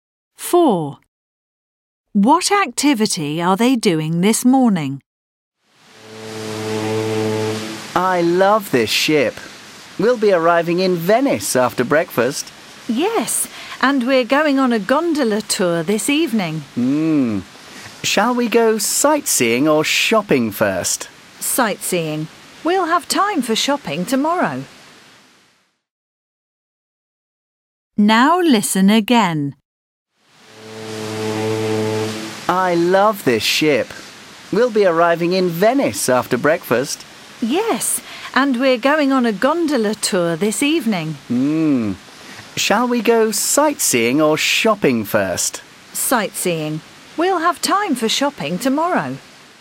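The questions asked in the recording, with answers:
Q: What activity are they doing this morning?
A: Sightseeing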